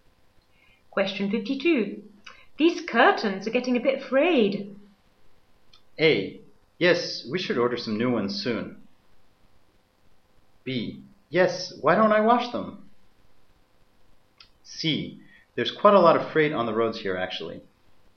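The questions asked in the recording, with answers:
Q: These curtains are getting a bit frayed.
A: A: Yes, we should order some new ones soon.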